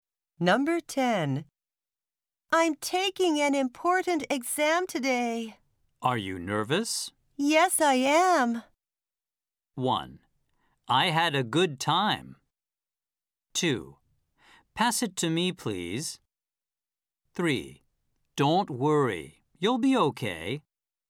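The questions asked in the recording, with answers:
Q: Yes, I am.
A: 3: Don't worry. You'll be okay.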